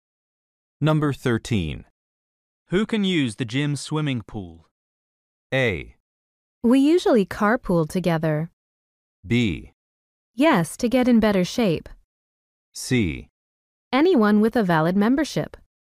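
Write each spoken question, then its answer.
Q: Who can use the gym swimming pool?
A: C: Anyone with a valid membership.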